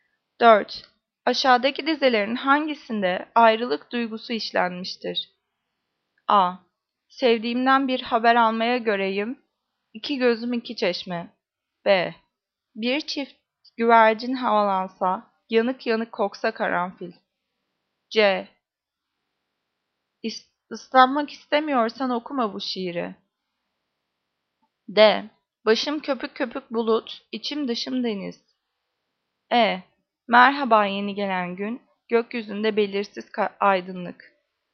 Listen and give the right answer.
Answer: Cevap A. Sevdiğimden bir haber almaya göreyim.